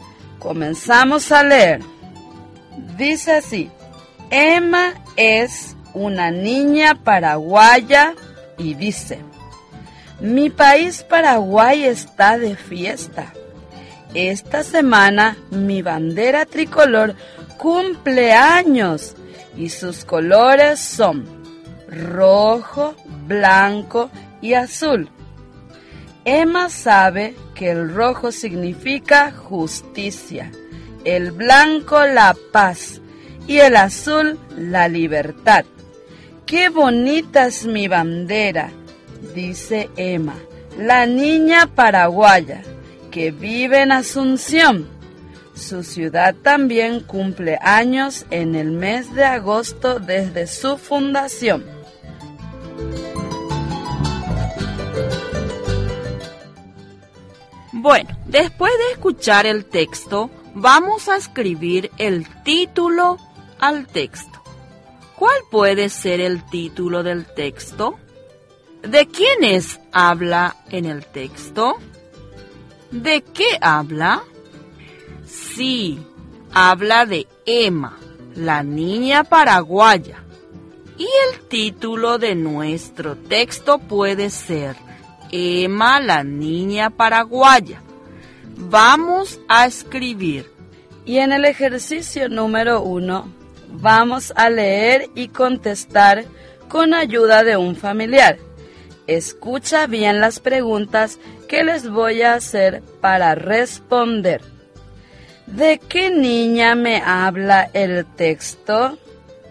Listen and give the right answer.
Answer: Sí, el texto habla de la niña Emma.